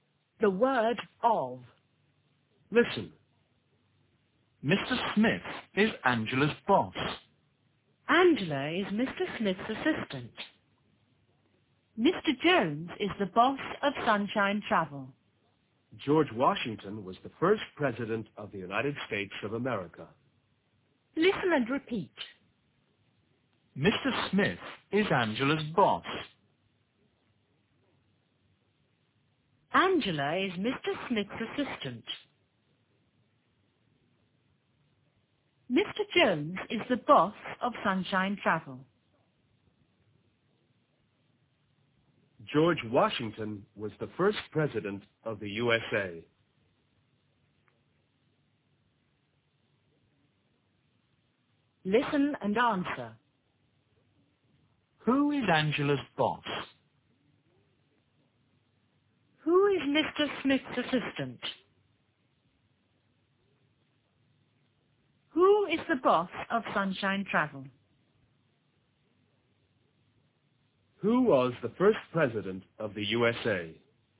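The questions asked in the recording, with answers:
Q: Who is Angela's boss?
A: Mr. Smith

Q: Who is Mr. Smith's assistant?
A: Angela

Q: Who is the boss of Sunshine Travel?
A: Mr. Jones

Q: Who was the first president of the USA?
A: George Washington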